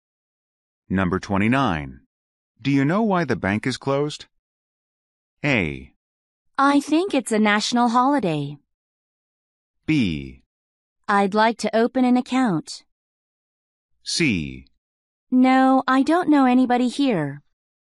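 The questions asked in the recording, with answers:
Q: Do you know why the bank is closed?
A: A: I think it's a national holiday.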